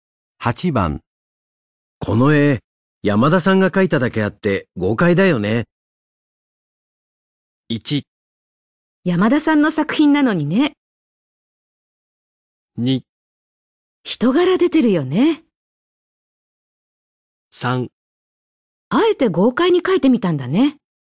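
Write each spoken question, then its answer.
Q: この絵、山田さんが描いただけあって豪快だよね。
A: 2: 人柄出てるよね。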